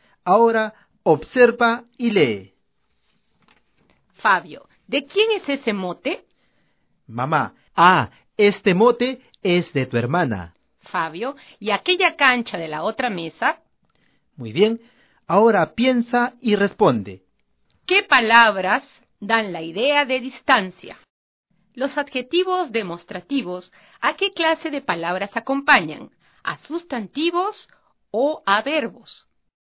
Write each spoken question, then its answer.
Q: ¿Qué palabras dan la idea de distancia?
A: Los adjetivos demostrativos son ese, este y aquella.